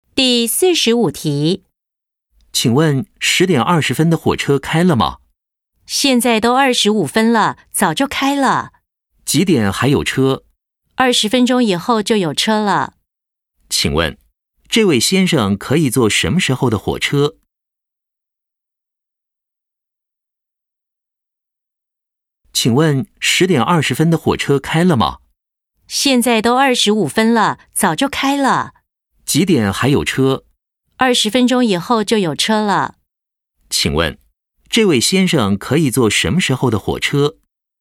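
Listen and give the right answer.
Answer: 10:45的火车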